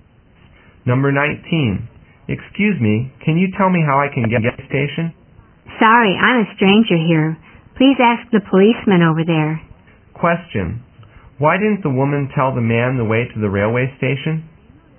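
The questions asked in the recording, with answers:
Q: Why didn't the woman tell the man the way to the railway station?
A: Because she is a stranger there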